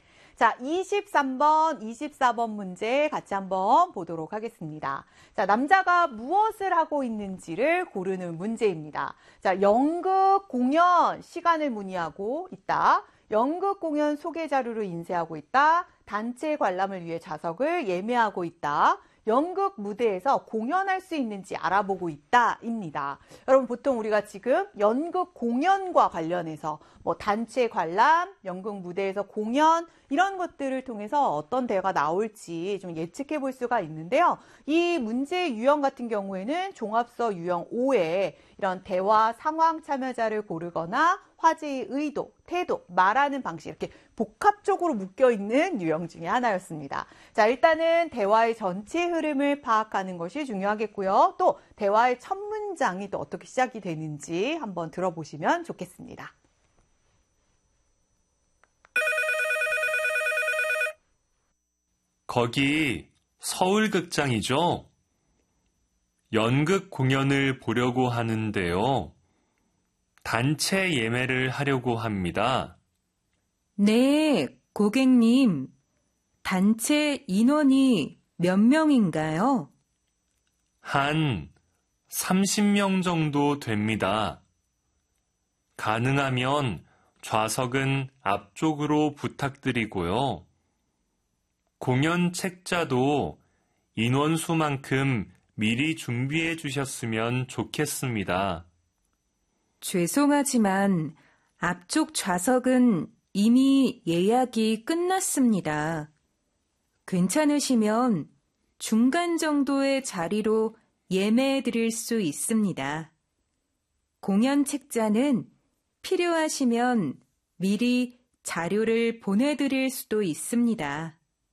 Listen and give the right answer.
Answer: 단체 관람을 위해 좌석을 예매하고 있는 상황이기 때문에 정답은 3번이 되겠습니다.